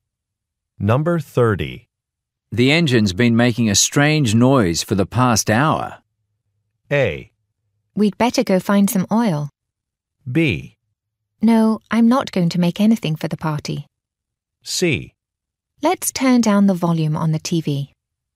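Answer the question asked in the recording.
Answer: A: We'd better go find some oil.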